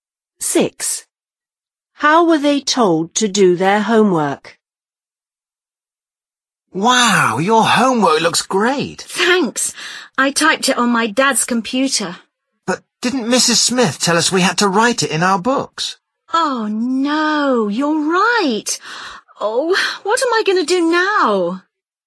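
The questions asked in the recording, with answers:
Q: How were they told to do their homework?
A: Write it in their books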